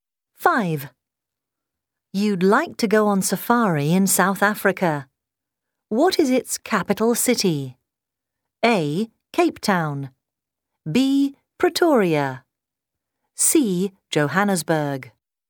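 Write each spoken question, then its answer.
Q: What is its capital city?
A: B: Pretoria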